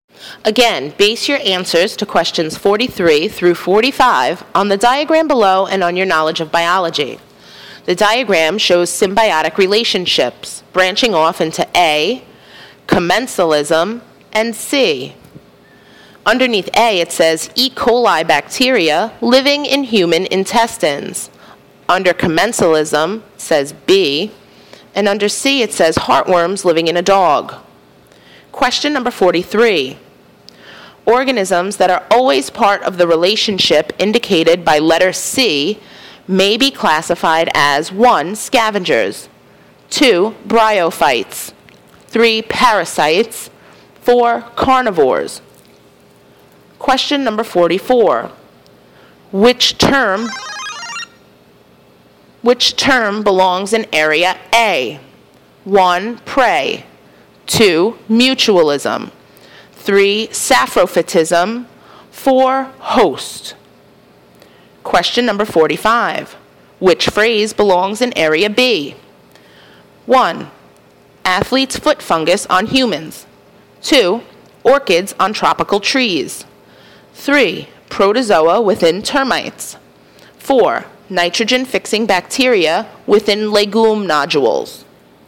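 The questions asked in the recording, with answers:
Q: Organisms that are always part of the relationship indicated by letter C may be classified as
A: 3: Parasites

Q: Which term belongs in area A?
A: 2: Mutualism

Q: Which phrase belongs in area B?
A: 2: Orchids on tropical trees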